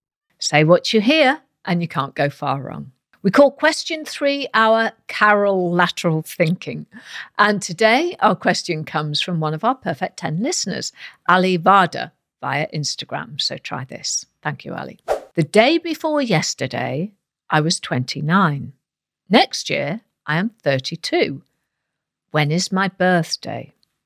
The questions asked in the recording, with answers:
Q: The day before yesterday, I was 29. Next year, I am 32. When is my birthday?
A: The answer we were looking for was December the 31st.